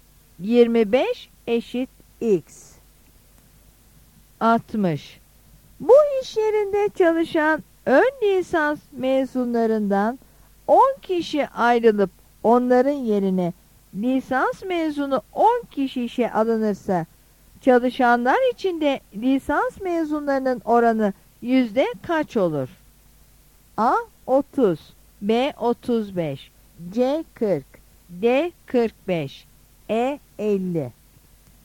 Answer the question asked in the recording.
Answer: Yanıt E'dir.